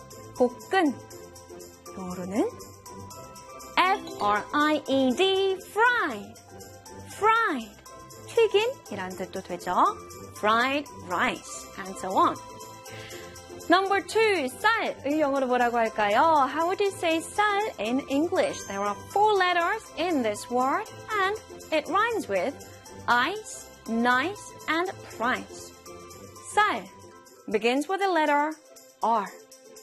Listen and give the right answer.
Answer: 쌀 in English is R-I-C-E, rice.